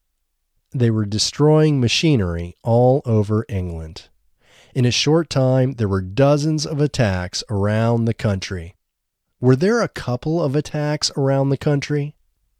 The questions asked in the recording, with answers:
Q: Were there a couple of attacks around the country?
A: No, there weren't a couple of attacks around the country.